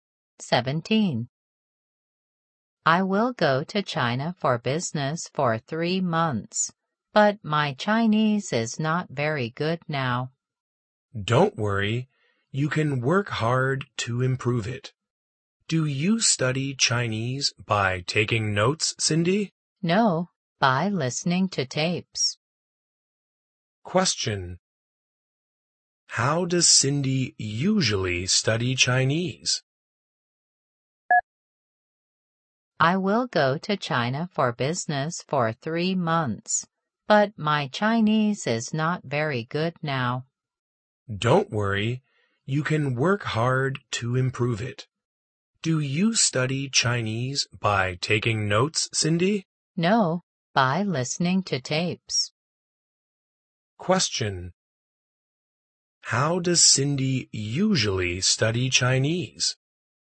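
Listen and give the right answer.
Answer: By listening to tapes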